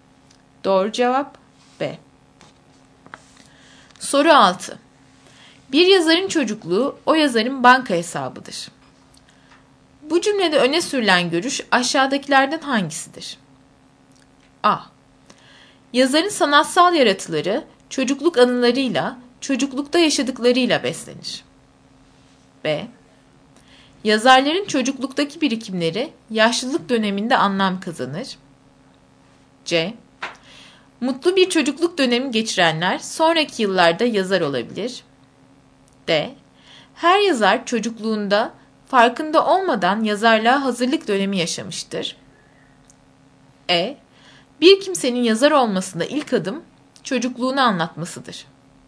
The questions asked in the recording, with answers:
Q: Bu cümlede öne sürülen görüş aşağıdakilerden hangisidir?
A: Doğru cevap A.